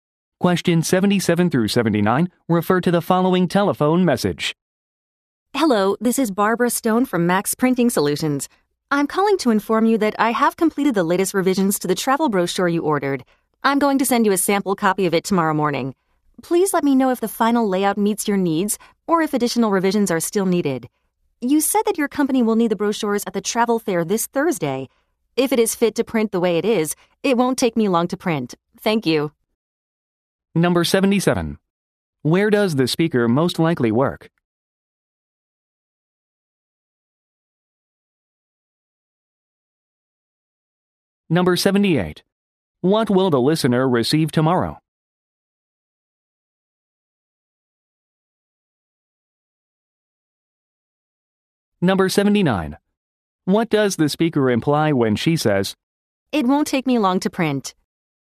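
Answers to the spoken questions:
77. At a printing company
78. A sample copy of the brochure
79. The brochures can be ready before Thursday's fair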